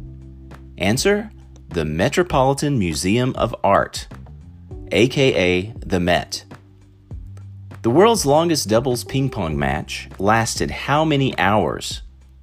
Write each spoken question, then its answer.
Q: The world's longest doubles ping pong match lasted how many hours?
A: 101 hours.